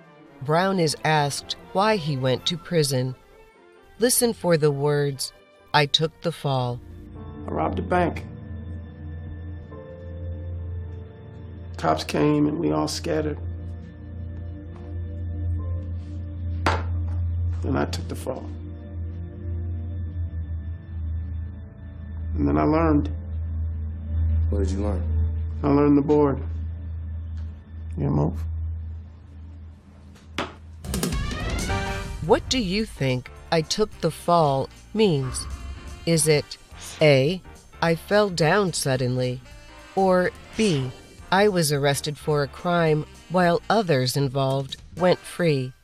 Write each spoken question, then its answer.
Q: What do you think I took the fall means? Is it A, I fell down suddenly, or B, I was arrested for a crime while others involved went free?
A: The answer is B.